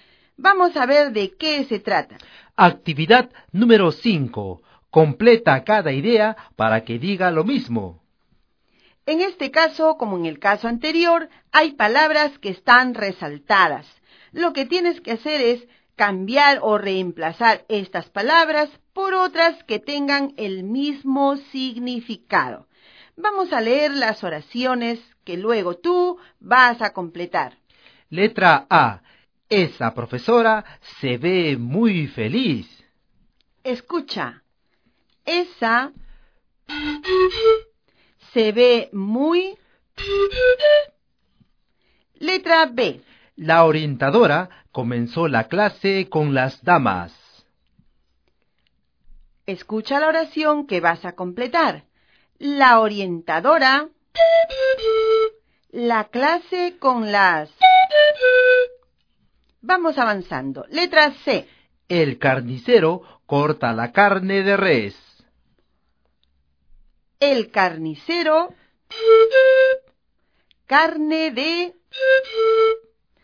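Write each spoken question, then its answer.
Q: El carnicero, carne de...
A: El carnicero troza carne de vaca.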